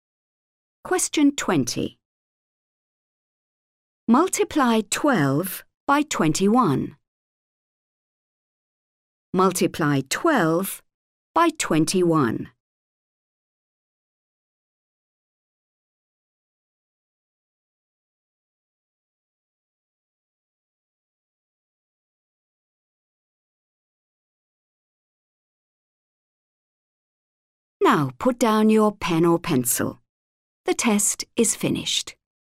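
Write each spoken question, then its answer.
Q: Multiply 12 by 21.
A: 252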